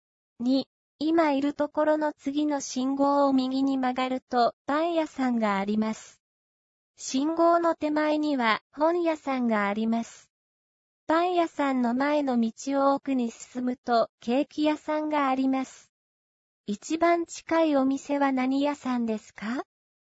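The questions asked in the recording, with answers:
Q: 一番近いお店は何屋さんですか?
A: 本屋さん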